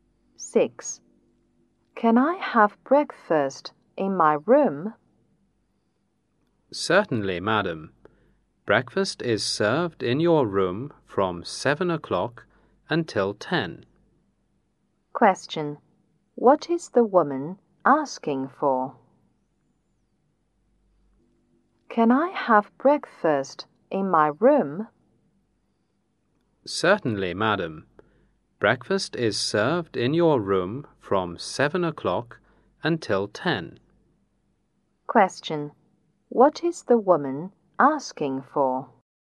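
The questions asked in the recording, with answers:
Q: What is the woman asking for?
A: Breakfast served in her room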